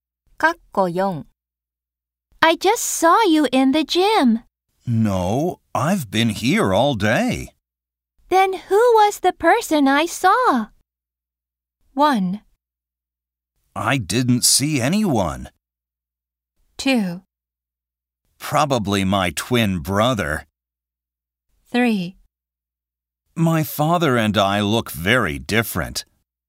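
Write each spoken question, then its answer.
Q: Then who was the person I saw?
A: 2: Probably my twin brother.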